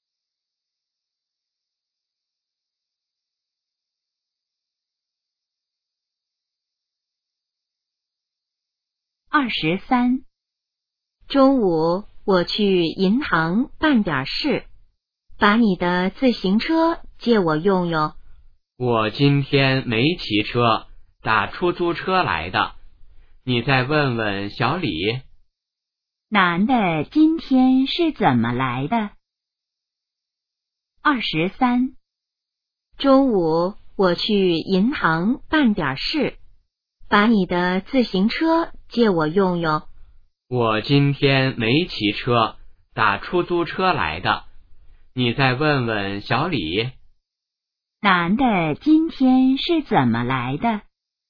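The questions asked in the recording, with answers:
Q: 男的今天是怎么来的?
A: 打出租车来的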